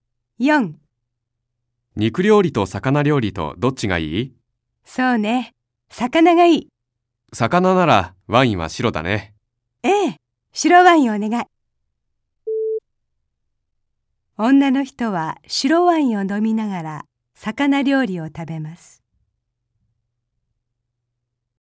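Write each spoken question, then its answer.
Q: 女の人は白ワインを飲みながら魚料理を食べます。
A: ○(正しい)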